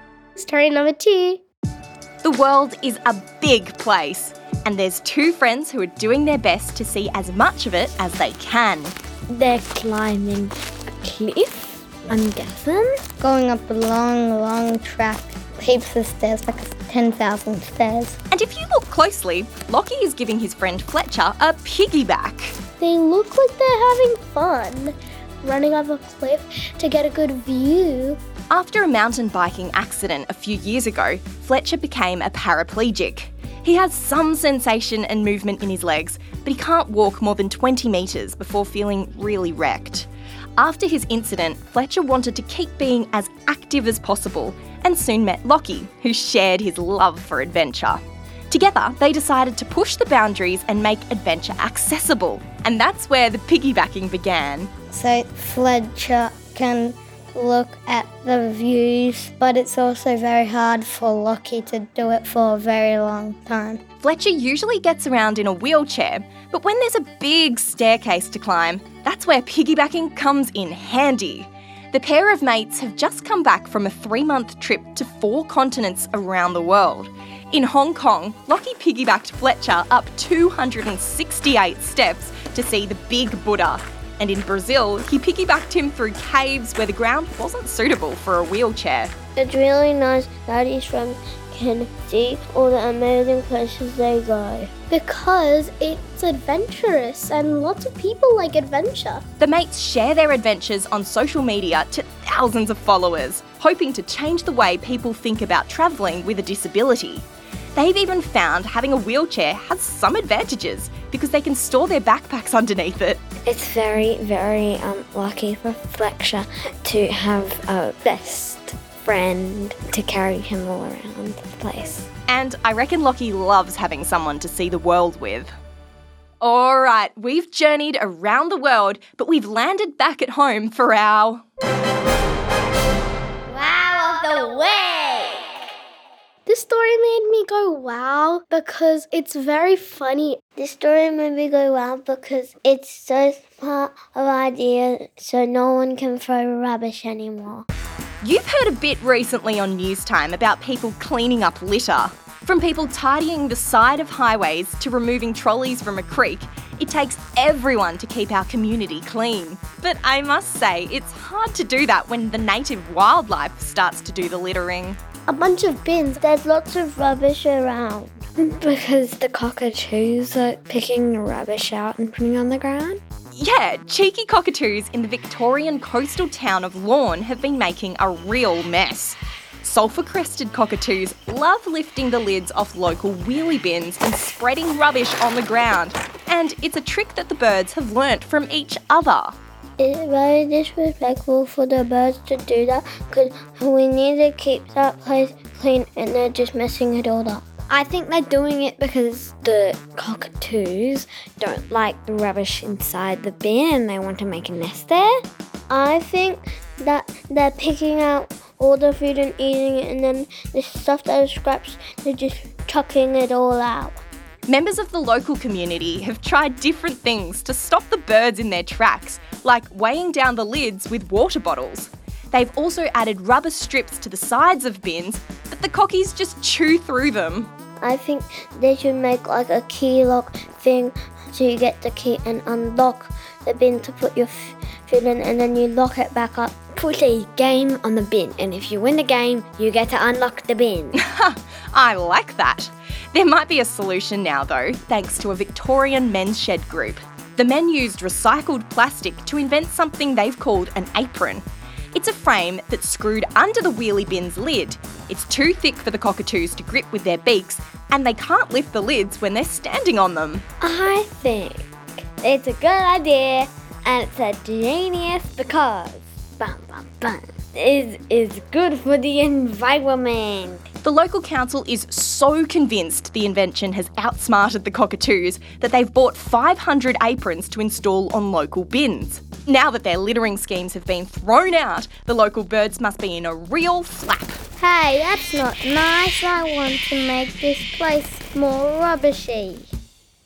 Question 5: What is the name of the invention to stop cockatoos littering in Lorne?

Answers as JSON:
{"5": "Apron"}